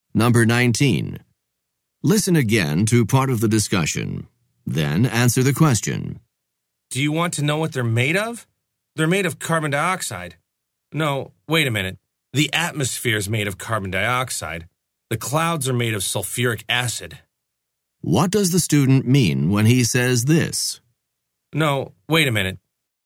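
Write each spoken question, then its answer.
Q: What does the student mean when he says this?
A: He realizes he made a mistake: the atmosphere, not the clouds, is made of carbon dioxide.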